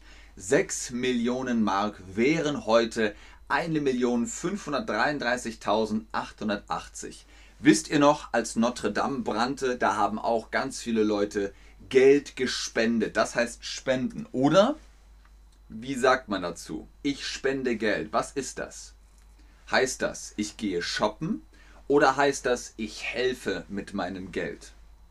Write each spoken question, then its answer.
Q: Heißt das, ich gehe shoppen oder heißt das, ich helfe mit meinem Geld?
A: Korrekt. Ich helfe mit meinem Geld.